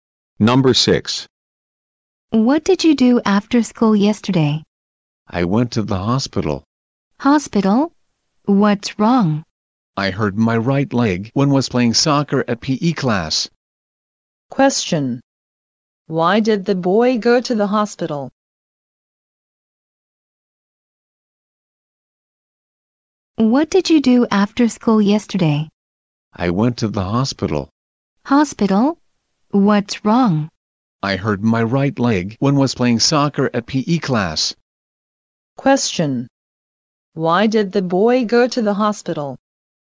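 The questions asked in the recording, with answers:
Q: Why did the boy go to the hospital?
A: He hurt his right leg playing soccer in PE class.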